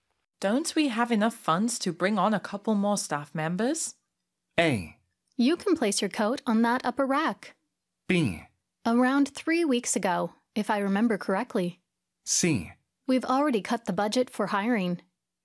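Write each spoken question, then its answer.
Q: Don't we have enough funds to bring on a couple more staff members?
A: C: We've already cut the budget for hiring.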